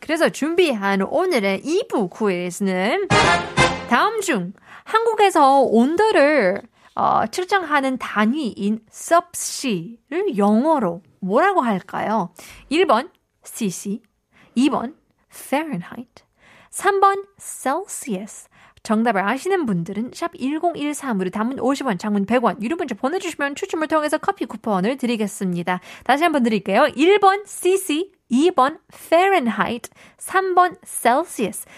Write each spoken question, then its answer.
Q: 다음 중 한국에서 온도를 어, 측정하는 단위인 섭씨를 영어로 뭐라고 할까요?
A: 정답 3번 셀시우스요